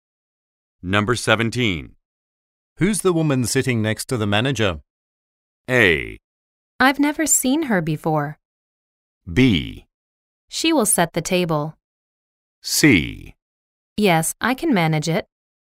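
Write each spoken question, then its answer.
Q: Who's the woman sitting next to the manager?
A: A: I've never seen her before.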